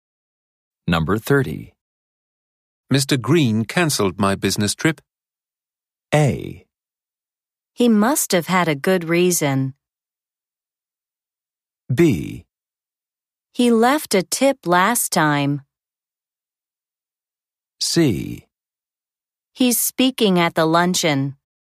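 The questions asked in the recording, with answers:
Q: Mr. Green cancelled my business trip.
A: A: He must have had a good reason.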